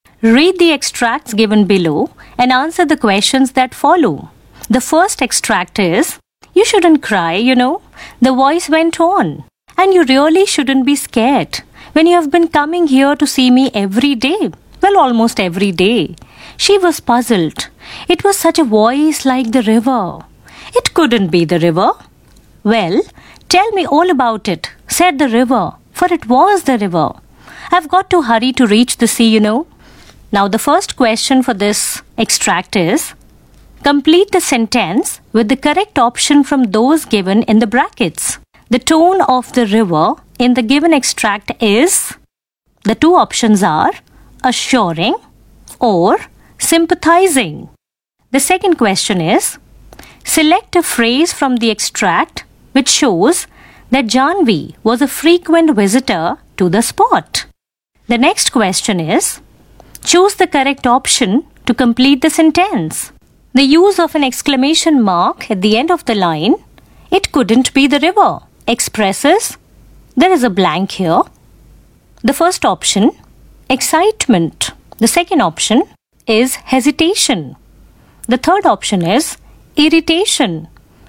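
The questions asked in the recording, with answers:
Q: select a phrase from the extract which shows that Janvi was a frequent visitor to the spot.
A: you have been coming here to see me every day, well, almost every day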